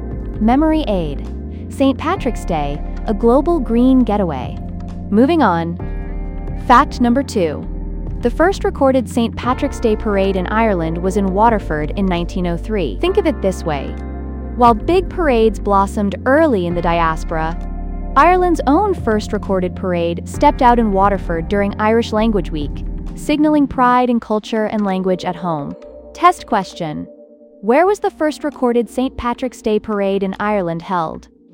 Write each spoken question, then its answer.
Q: Where was the first recorded St. Patrick's Day parade in Ireland held?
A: Correct answer, Waterford.